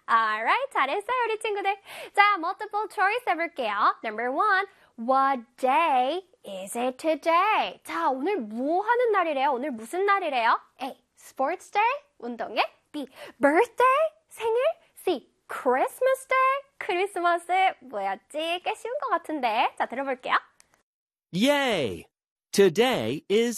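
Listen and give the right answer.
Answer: A: sports day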